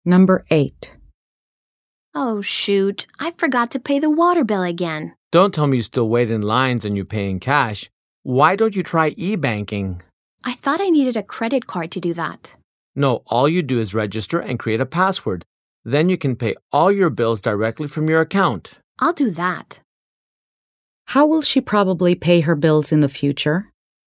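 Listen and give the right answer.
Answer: Online, through e-banking directly from her account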